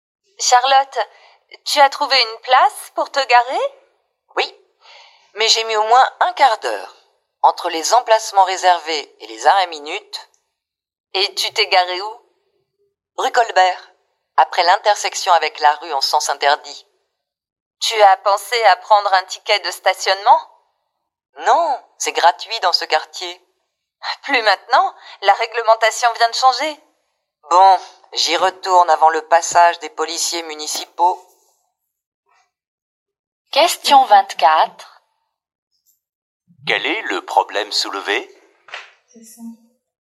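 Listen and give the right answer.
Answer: Le stationnement est devenu payant et elle n'a pas de ticket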